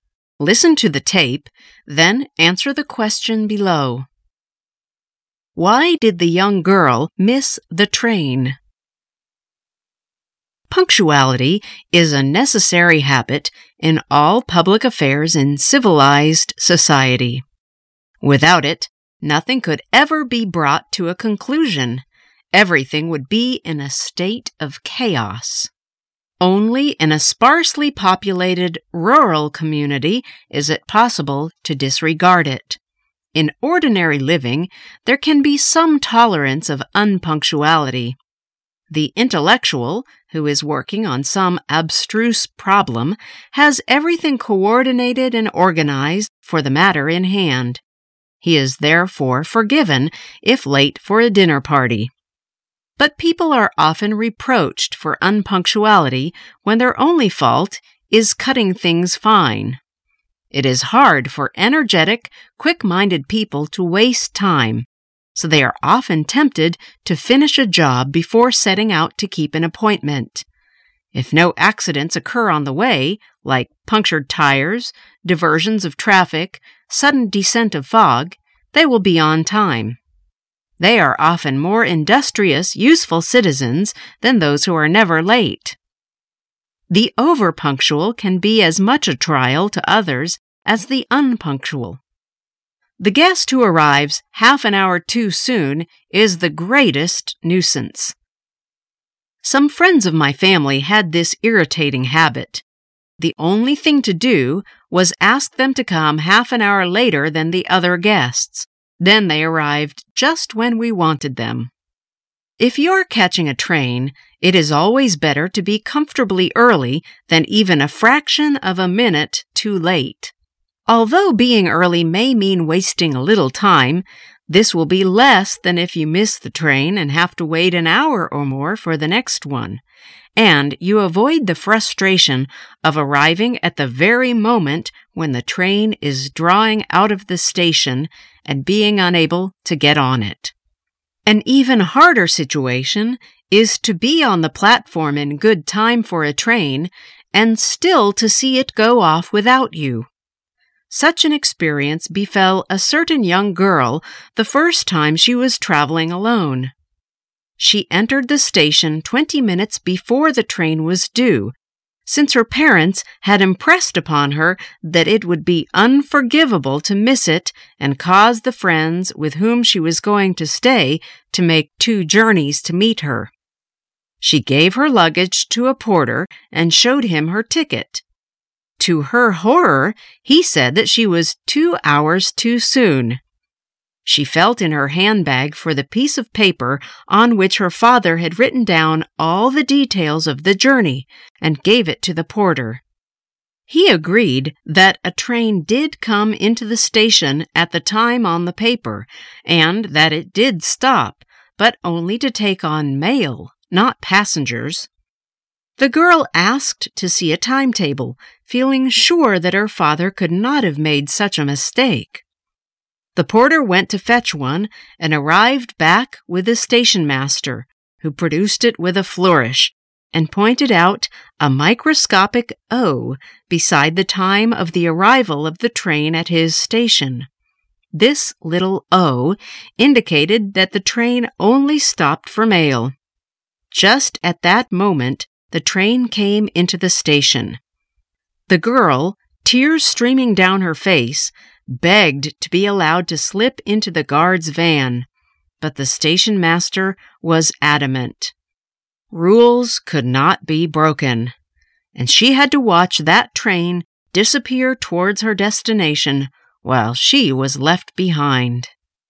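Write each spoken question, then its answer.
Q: Why did the young girl miss the train?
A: The train only stopped there for mail, not passengers, so she wasn't allowed to board it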